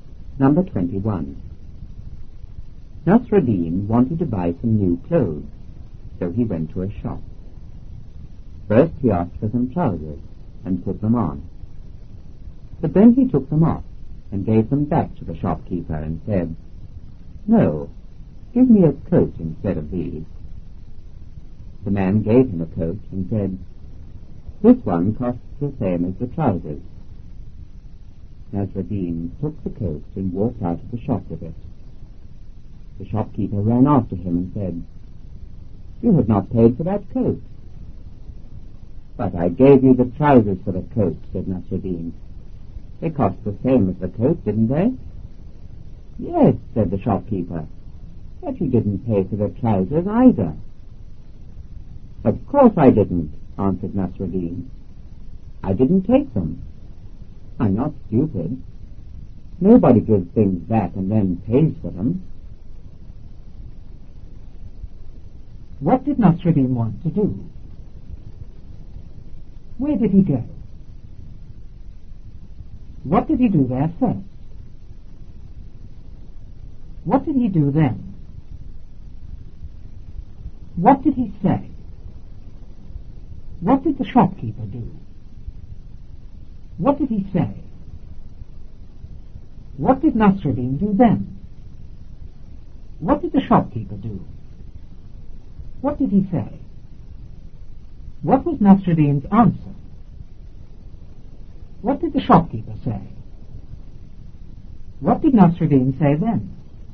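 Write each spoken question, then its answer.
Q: What did Nasruddin want to do?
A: Buy some new clothes

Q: Where did he go?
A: To a shop

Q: What did he do there first?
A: He asked for some trousers and put them on

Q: What did he do then?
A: He took them off and gave them back to the shopkeeper

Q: What did he say?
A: "No, give me a coat instead of these."

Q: What did the shopkeeper do?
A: He gave him a coat

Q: What did he say?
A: "This one costs the same as the trousers."

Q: What did Nasruddin do then?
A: He took the coat and walked out of the shop with it

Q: What did the shopkeeper do?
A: He ran after him

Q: What did he say?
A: "You have not paid for that coat."

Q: What was Nasruddin's answer?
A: "But I gave you the trousers for the coat. They cost the same as the coat, didn't they?"

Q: What did the shopkeeper say?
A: "Yes, but you didn't pay for the trousers either."

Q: What did Nasruddin say then?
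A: "Of course I didn't. I didn't take them. I'm not stupid. Nobody gives things back and then pays for them."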